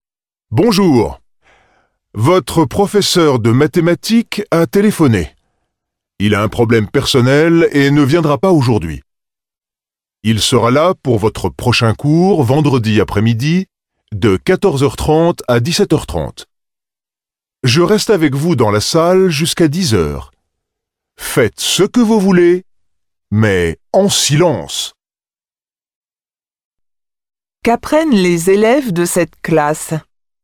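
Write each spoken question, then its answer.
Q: Qu'apprennent les élèves de cette classe ?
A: Leur professeur de mathématiques ne viendra pas aujourd'hui.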